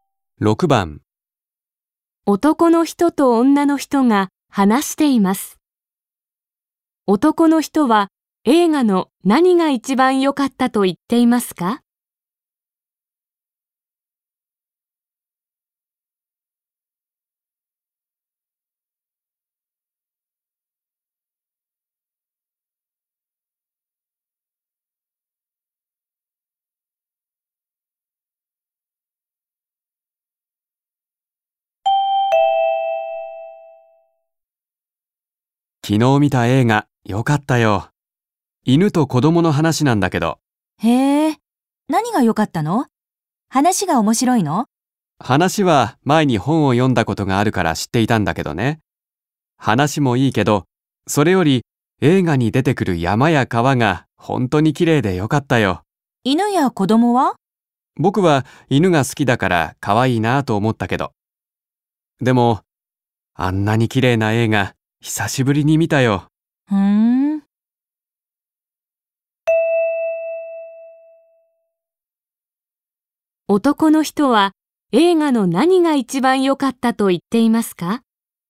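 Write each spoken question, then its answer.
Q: 男の人は映画の何が一番良かったと言っていますか?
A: 映画に出てくる山や川がきれいだったこと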